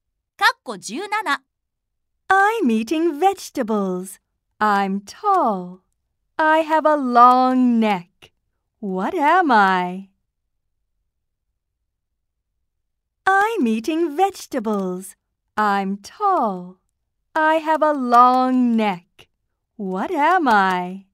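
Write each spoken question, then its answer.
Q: I'm eating vegetables. I'm tall. I have a long neck. What am I?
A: A giraffe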